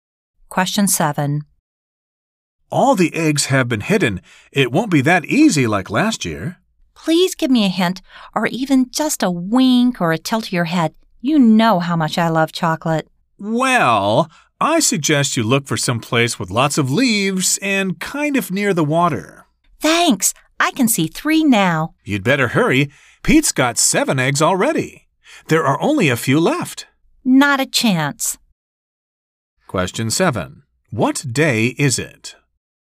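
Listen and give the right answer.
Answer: Easter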